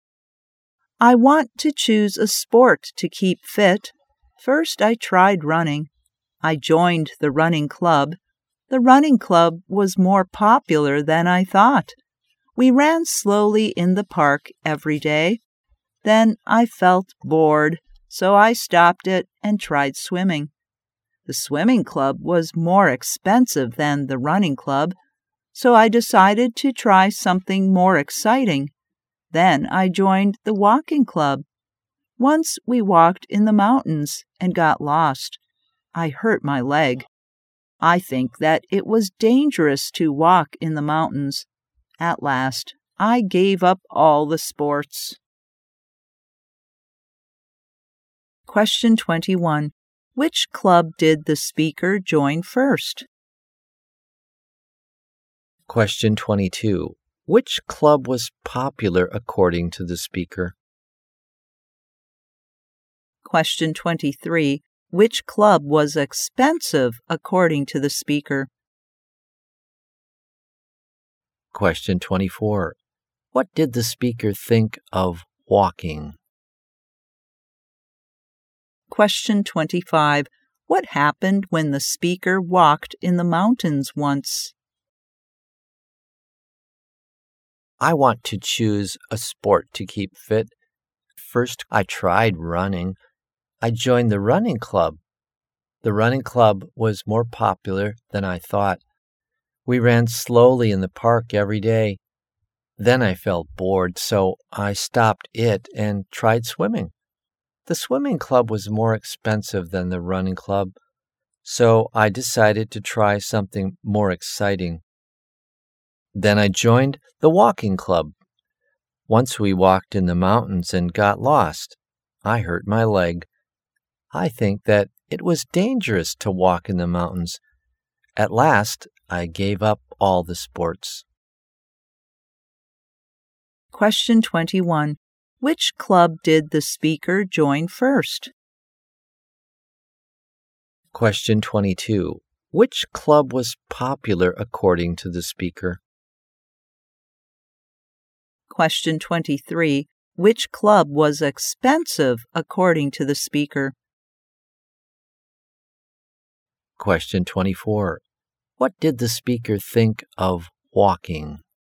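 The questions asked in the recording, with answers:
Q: Which club did the speaker join first?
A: The running club

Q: Which club was popular according to the speaker?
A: The running club

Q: Which club was expensive according to the speaker?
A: The swimming club

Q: What did the speaker think of walking?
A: It was dangerous to walk in the mountains

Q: What happened when the speaker walked in the mountains once?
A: They got lost and the speaker hurt a leg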